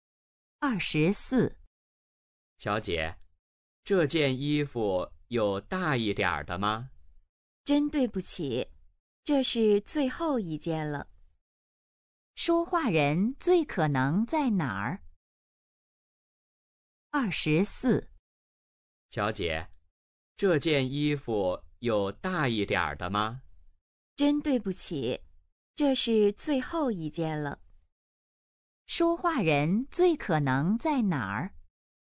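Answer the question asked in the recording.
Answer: 商店(服装店)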